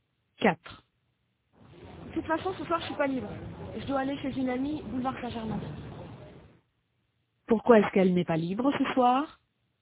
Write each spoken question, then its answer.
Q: Pourquoi est-ce qu'elle n'est pas libre ce soir?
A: Parce qu'elle doit aller chez une amie, boulevard Saint-Germain.